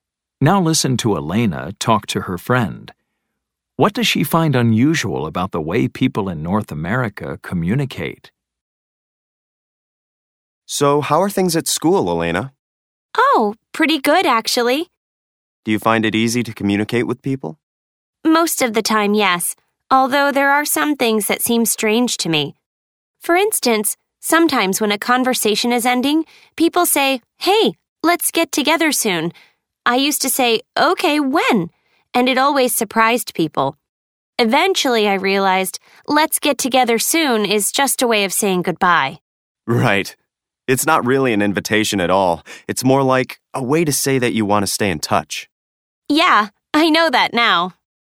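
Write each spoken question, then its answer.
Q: What does she find unusual about the way people in North America communicate?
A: People say "Let's get together soon" when a conversation is ending, but it is just a way of saying goodbye, not a real invitation.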